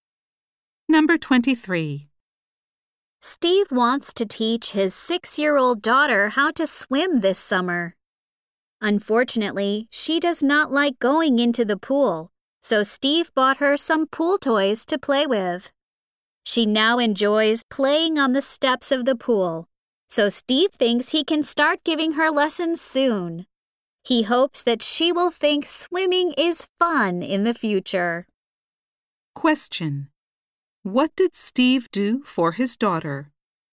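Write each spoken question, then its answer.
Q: What did Steve do for his daughter?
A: He bought her some pool toys.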